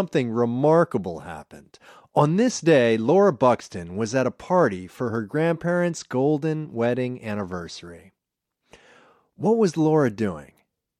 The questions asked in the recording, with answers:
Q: What was Laura doing?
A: She was at a party.